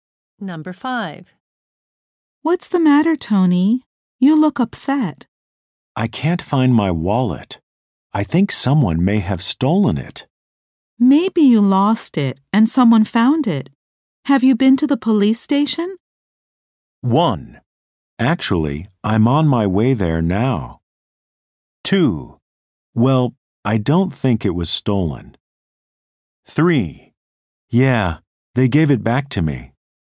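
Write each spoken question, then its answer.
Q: Have you been to the police station?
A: 1: Actually, I'm on my way there now.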